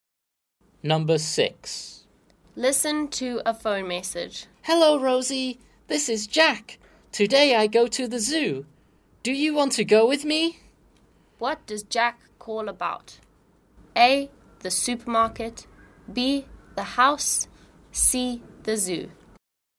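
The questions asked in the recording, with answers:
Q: What does Jack call about?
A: C: The zoo.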